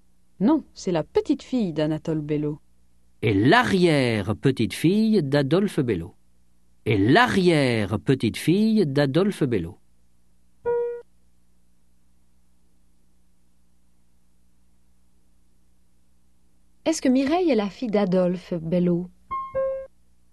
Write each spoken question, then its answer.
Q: Est-ce que Mireille est la fille d'Adolphe Bello?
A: Non, c'est l'arrière-petite-fille d'Adolphe Bello.